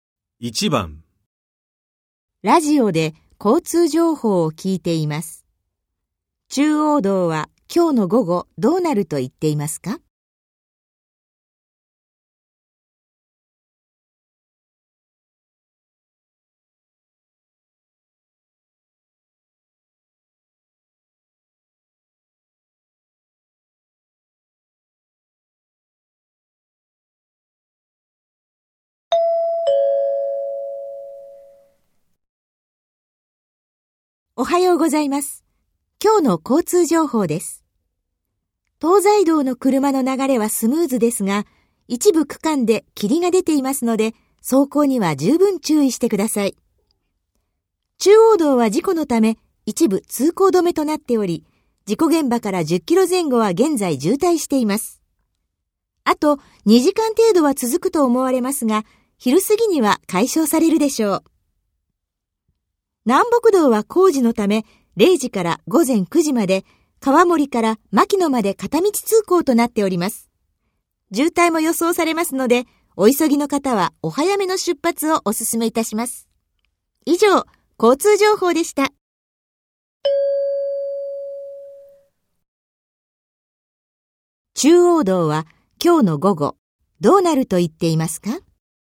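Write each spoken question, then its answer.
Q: 中央道は今日の午後、どうなると言っていますか?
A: 渋滞が解消される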